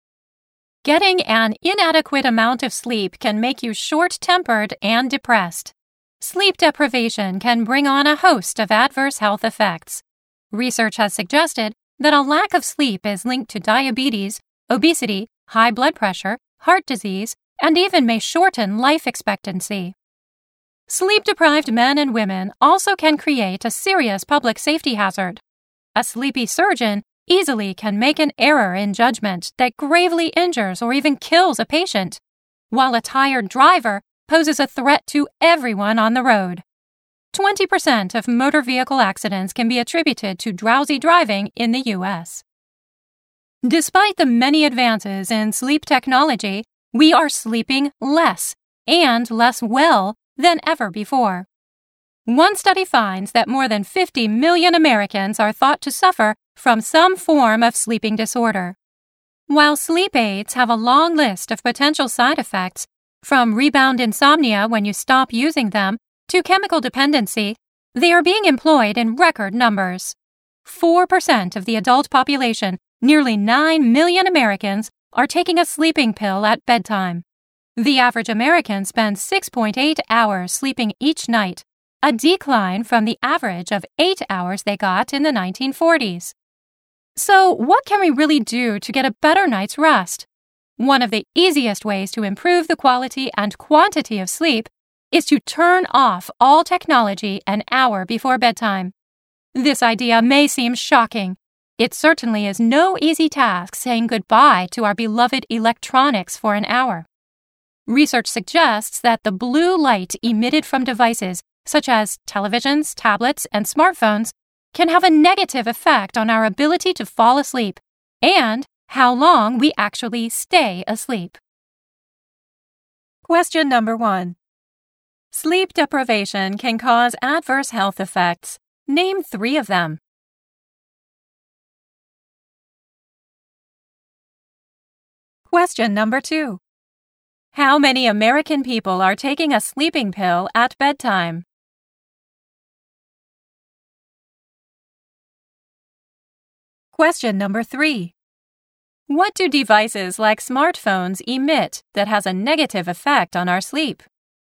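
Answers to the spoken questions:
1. Diabetes, obesity, high blood pressure (also heart disease)
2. Nearly 9 million (4% of adults)
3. Blue light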